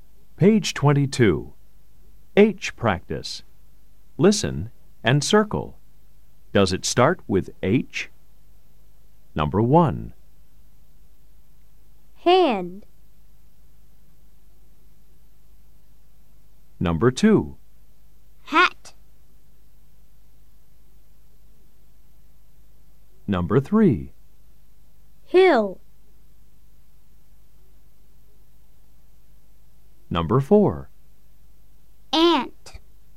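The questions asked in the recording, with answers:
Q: Does it start with H? Number 1. hand.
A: Yes

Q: Number 2. Hat.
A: Yes

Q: Number 3. Hill.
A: Yes

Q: Number 4. Ant.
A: No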